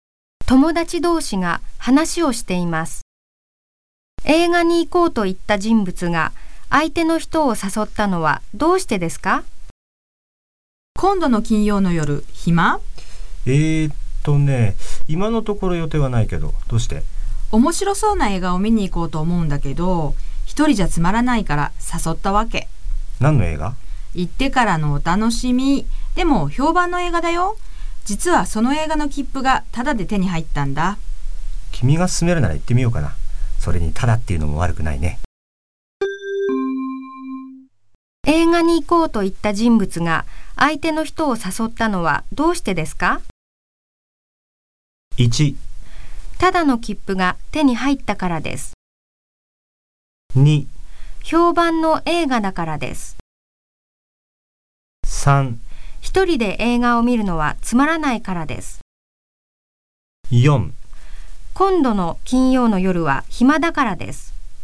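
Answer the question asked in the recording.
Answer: 3: 一人で映画を見るのはつまらないからです。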